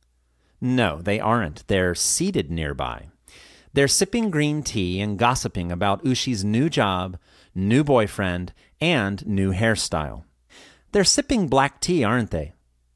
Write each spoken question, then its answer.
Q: They're sipping black tea, aren't they?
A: No, they're sipping green tea.